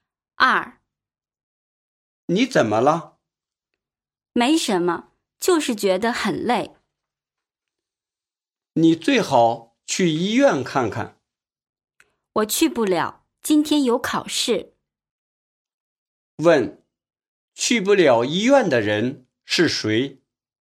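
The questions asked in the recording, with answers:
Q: 问,去不了医院的人是谁?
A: 觉得很累、今天有考试的人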